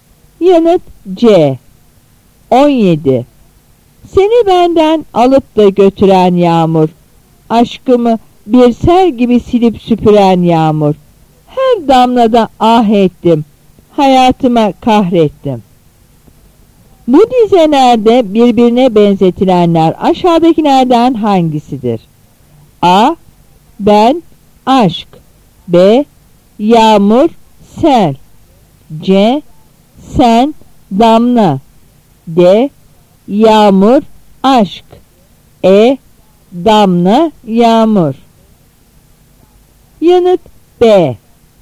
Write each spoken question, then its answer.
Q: Bu dizelerde birbirine benzetilenler aşağıdakilerden hangisidir?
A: Yanıt B.